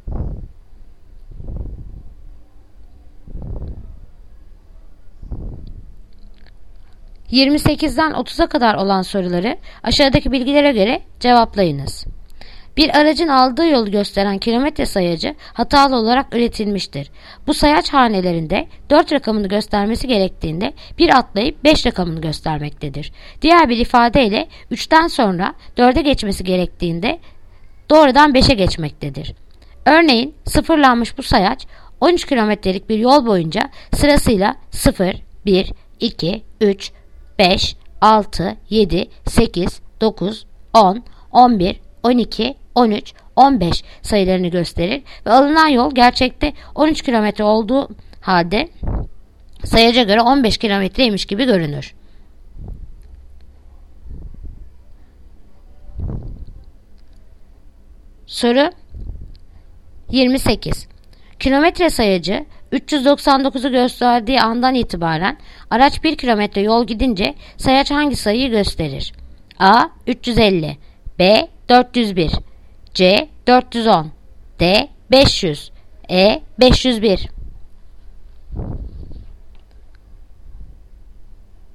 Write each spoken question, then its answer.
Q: Kilometre sayacı 399'u gösterdiği andan itibaren araç 1 kilometre yol gidince sayaç hangi sayıyı gösterir?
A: Yanıt Diyarbakır 500